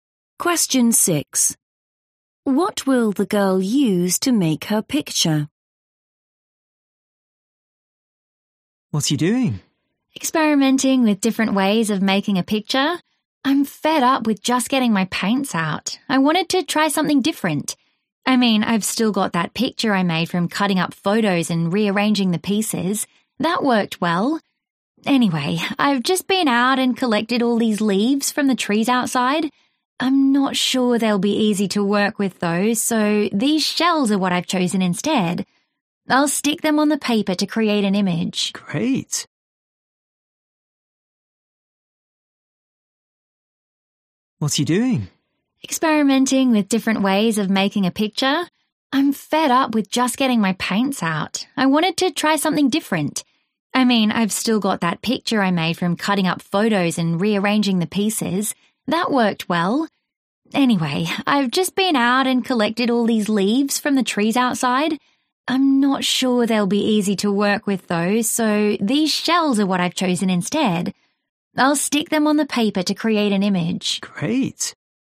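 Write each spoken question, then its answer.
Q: What will the girl use to make her picture?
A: shells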